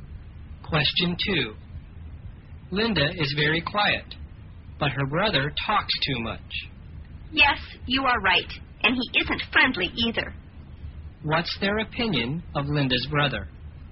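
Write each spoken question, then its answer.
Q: What's their opinion of Linda's brother?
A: He talks too much and isn't friendly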